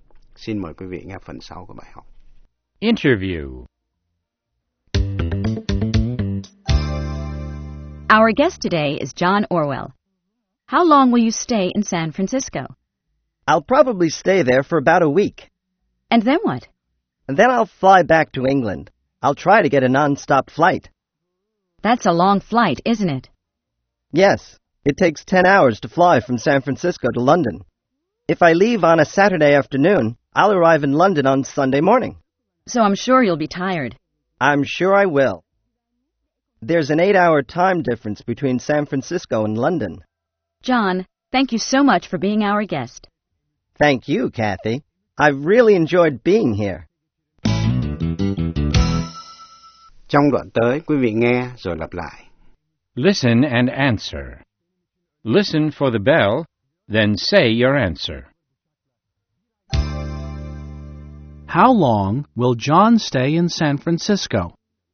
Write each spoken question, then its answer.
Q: How long will John stay in San Francisco?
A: He'll probably stay there for about a week.